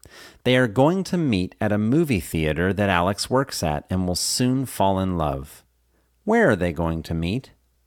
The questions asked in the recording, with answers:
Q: Where are they going to meet?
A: They are going to meet in a movie theater that Alex works at.